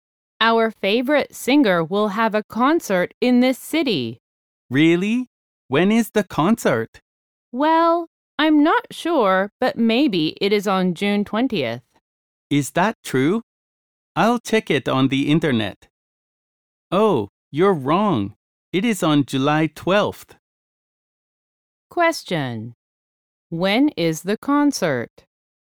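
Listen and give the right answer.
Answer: July 12th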